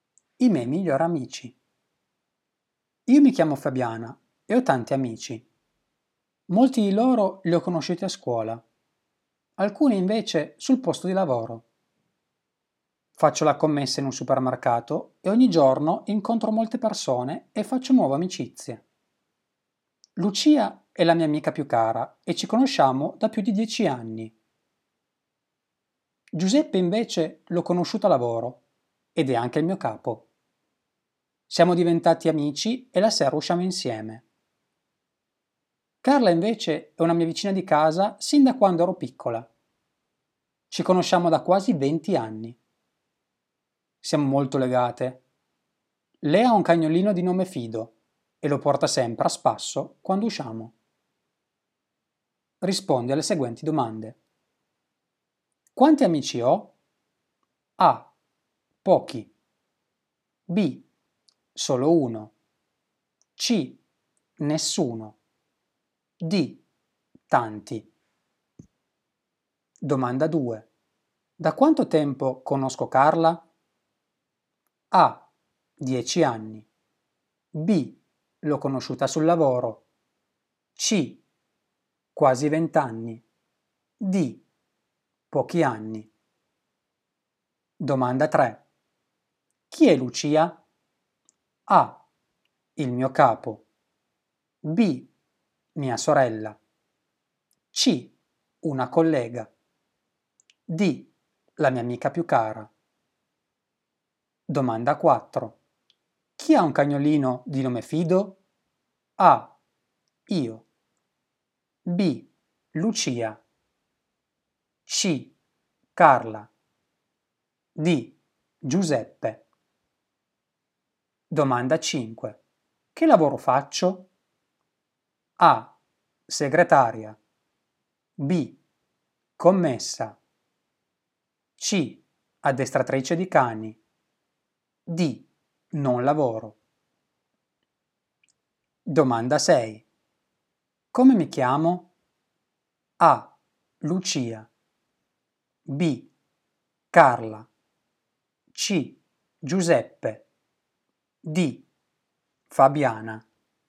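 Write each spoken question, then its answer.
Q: Quanti amici ho?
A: D: Tanti.

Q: Da quanto tempo conosco Carla?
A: C: Quasi 20 anni.

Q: Chi è Lucia?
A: D: La mia amica più cara.

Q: Chi ha un cagnolino di nome Fido?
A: C: Carla.

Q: Che lavoro faccio?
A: B: Commessa.

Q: Come mi chiamo?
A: D: Fabiana.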